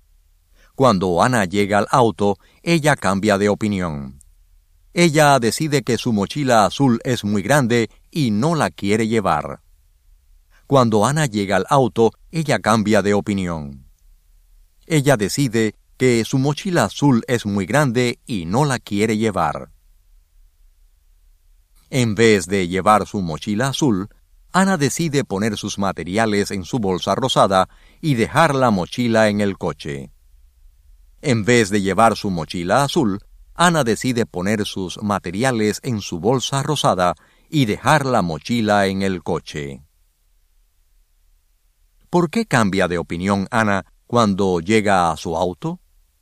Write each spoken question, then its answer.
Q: ¿Por qué cambia de opinión Ana cuando llega a su auto?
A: Ella cambia de opinión porque ella piensa que su mochila azul es muy grande y ella decide poner sus materiales en su bolsa rosada.